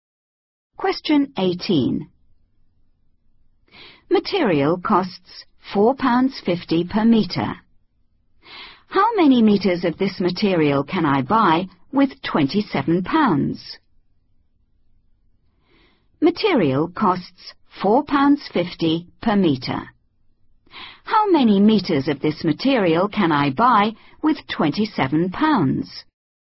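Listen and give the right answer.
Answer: 6 m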